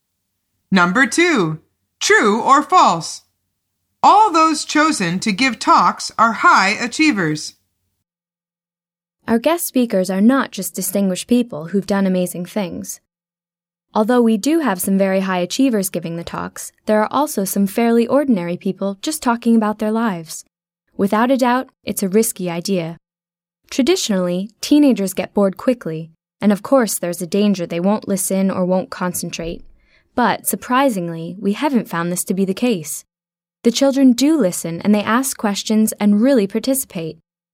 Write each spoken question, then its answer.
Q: true or false? All those chosen to give talks are high achievers.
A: The answer is false.